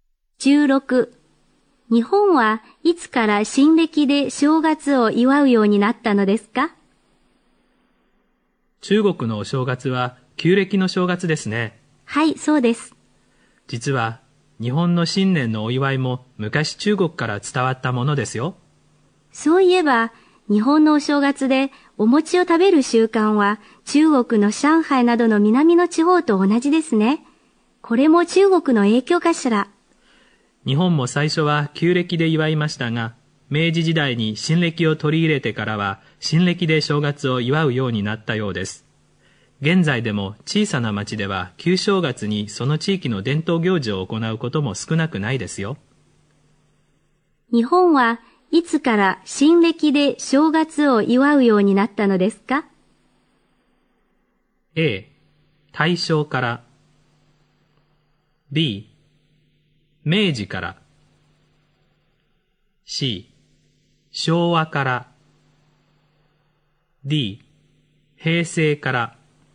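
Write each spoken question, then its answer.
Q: 日本はいつから新暦で正月を祝うようになったのですか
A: B: 明治から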